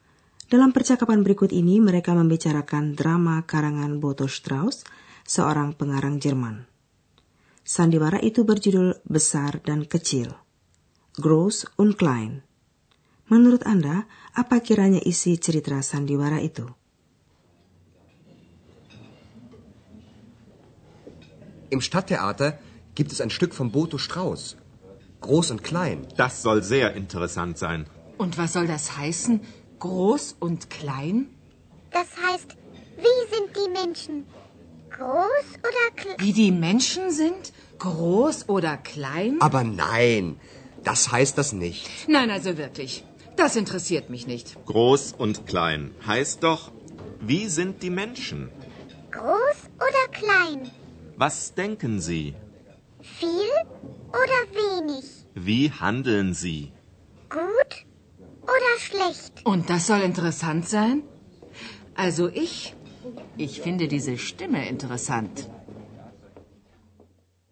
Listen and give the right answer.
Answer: Menurut Pak Schaefer, besar dan kecil menjadi kiasan bagi tabiat manusia, bagi keanekaragaman pikiran dan perbuatan mereka.